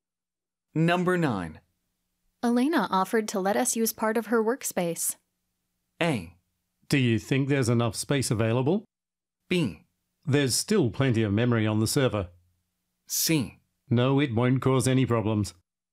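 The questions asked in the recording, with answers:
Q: Elena offered to let us use part of her workspace.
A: A: Do you think there's enough space available?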